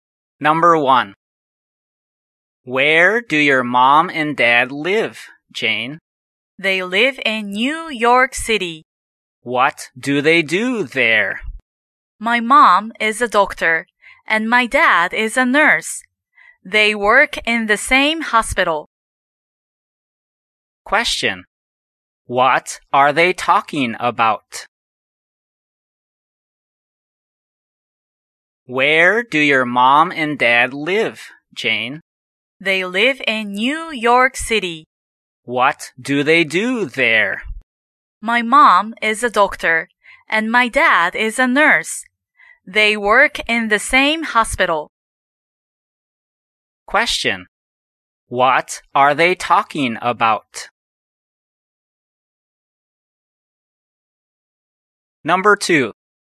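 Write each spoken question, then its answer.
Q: What are they talking about?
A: Jane's parents' jobs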